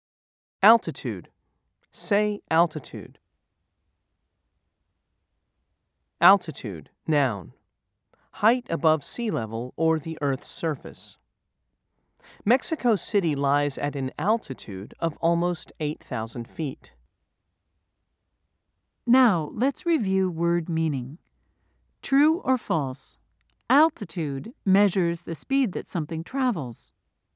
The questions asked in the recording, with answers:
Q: True or false? Altitude measures the speed that something travels.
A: If you said false, you're correct.